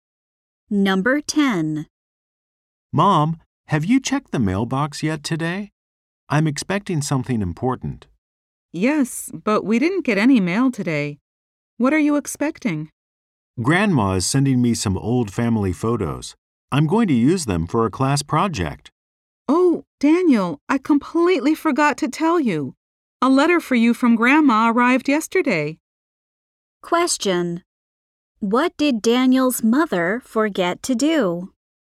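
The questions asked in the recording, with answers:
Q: What did Daniel's mother forget to do?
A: Tell him a letter from Grandma had arrived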